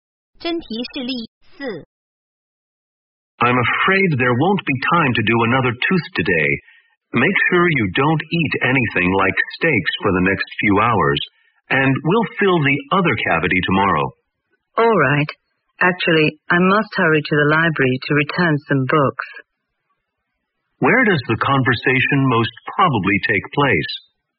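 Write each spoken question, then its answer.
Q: Where does the conversation most probably take place?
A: At a dentist's office.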